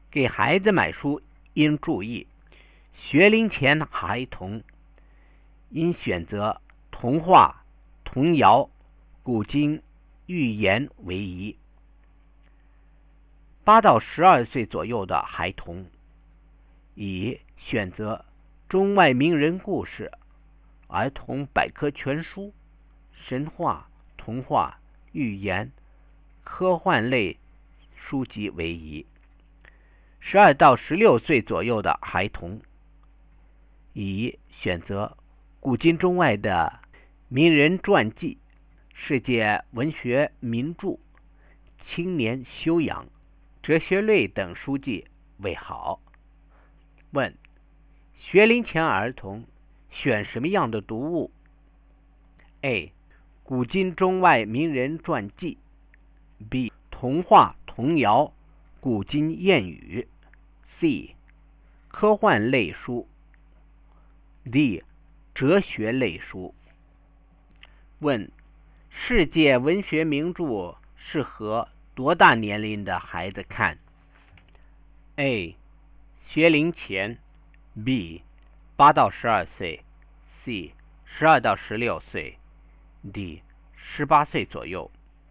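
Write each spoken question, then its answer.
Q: 学龄前儿童选什么样的读物?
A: B: 童话童谣古今谚语

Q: 世界文学名著适合多大年龄的孩子看?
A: C: 12到16岁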